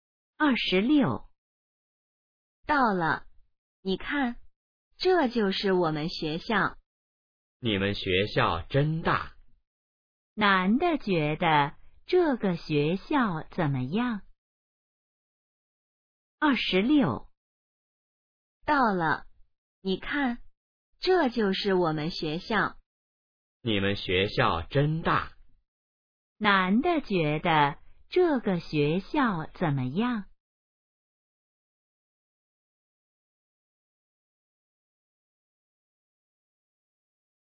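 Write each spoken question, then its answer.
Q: 男的觉得这个学校怎么样?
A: 很大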